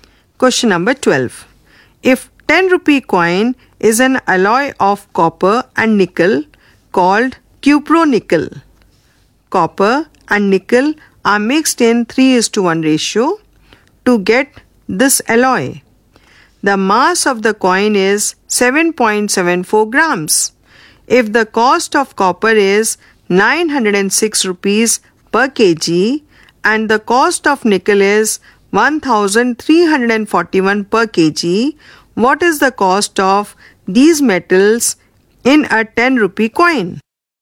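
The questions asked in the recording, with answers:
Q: If the cost of copper is 906 rupees per kg and the cost of nickel is 1341 per kg, what is the cost of these metals in a 10 rupee coin?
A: About 7.85 rupees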